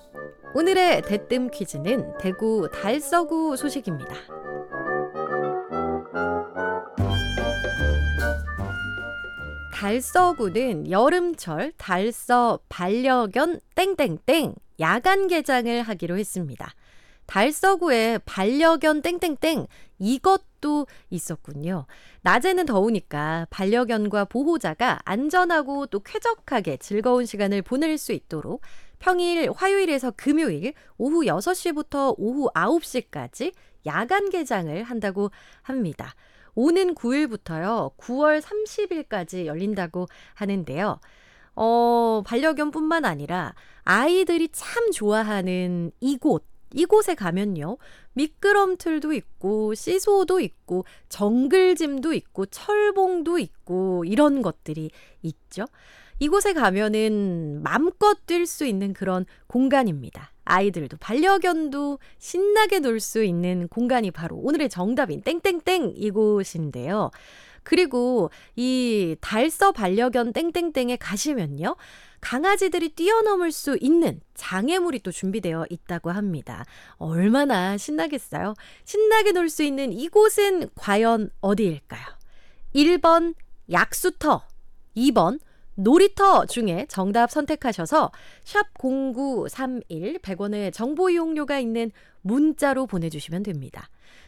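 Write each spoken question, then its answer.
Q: 신나게 놀 수 있는 이곳은 과연 어디일까요?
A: 2: 놀이터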